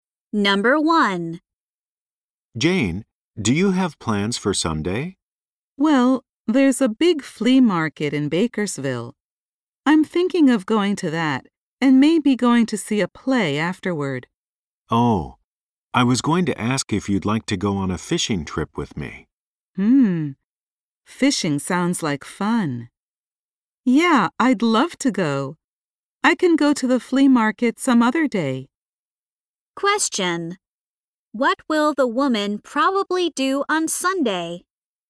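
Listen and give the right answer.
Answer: Go on a fishing trip with the man.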